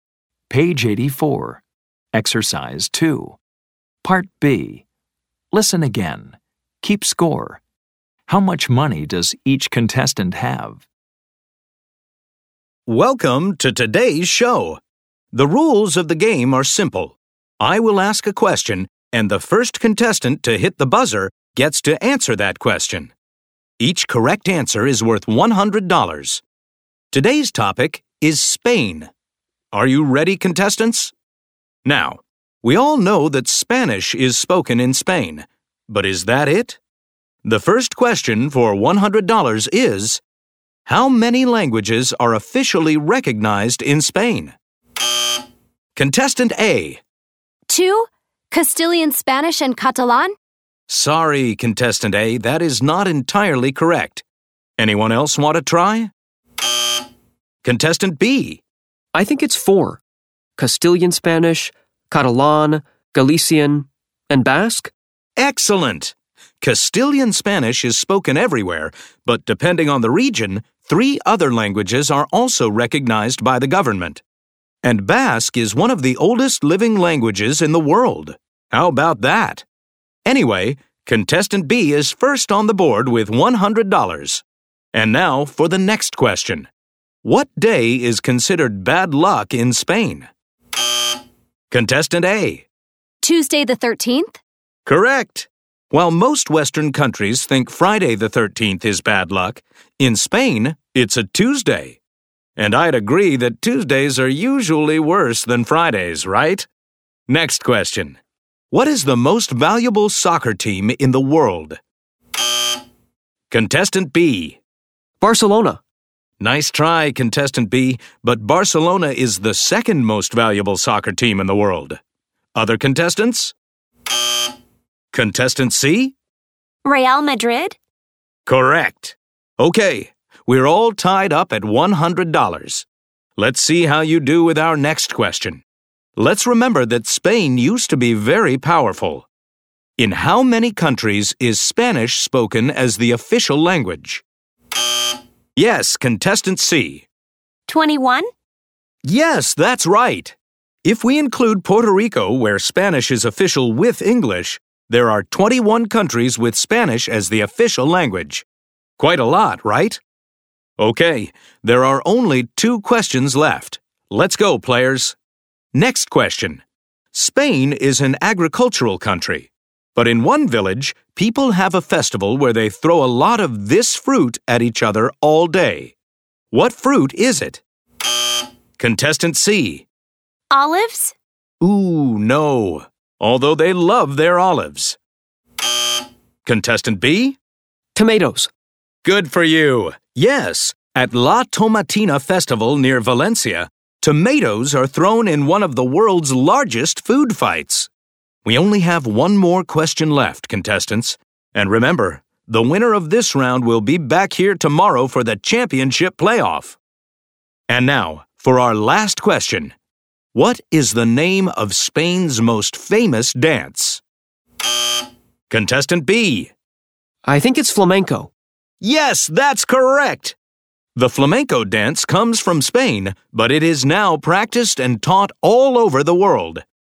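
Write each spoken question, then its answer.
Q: How much money does each contestant have?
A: Contestant A: $100, Contestant B: $300, Contestant C: $200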